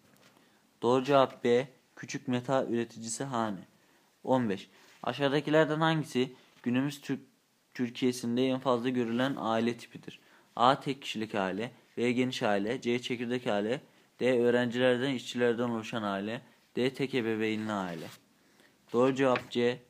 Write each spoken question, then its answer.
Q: Aşağıdakilerden hangisi günümüz Türkiye'sinde en fazla görülen aile tipidir?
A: Doğru cevap C. Çekirdek aile.